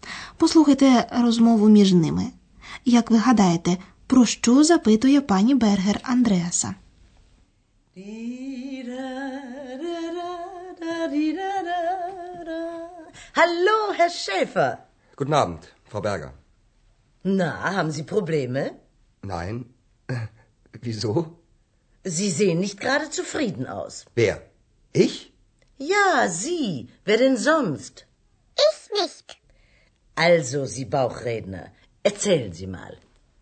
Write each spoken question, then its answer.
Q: Як ви гадаєте, про що запитує пані Бергер Андреаса?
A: Отже, пані Бергер запитує Андреаса. Haben Sie Probleme? Чи маєте ви якісь проблеми?